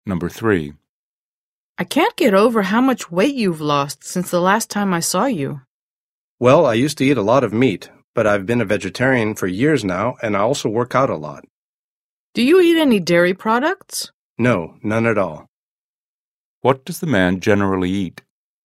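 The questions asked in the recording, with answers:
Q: What does the man generally eat?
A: Vegetarian food with no meat or dairy products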